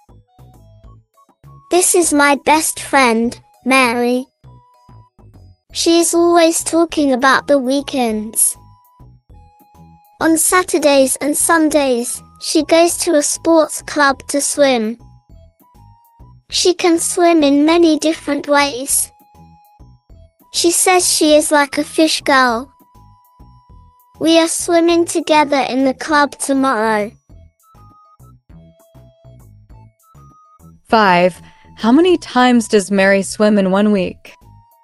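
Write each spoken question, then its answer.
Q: How many times does Mary swim in 1 week?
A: twice (Saturdays and Sundays)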